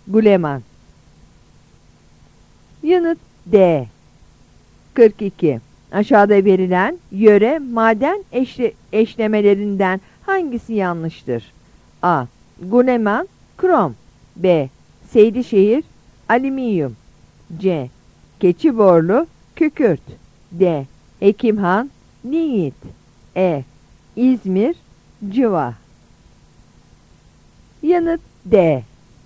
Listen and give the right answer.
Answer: Yanıt D.